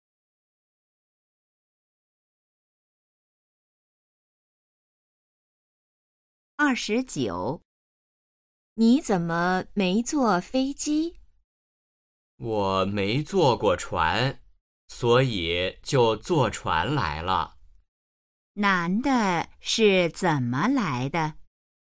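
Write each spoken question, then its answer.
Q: 男的是怎么来的?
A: 坐船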